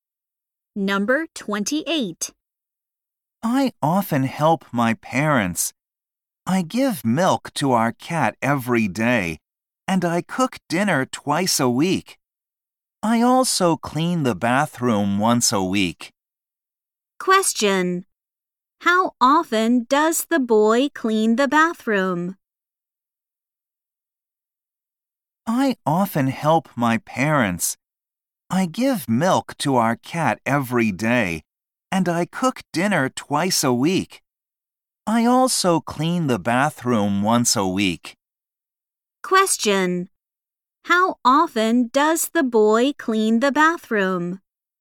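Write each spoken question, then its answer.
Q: How often does the boy clean the bathroom?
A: Once a week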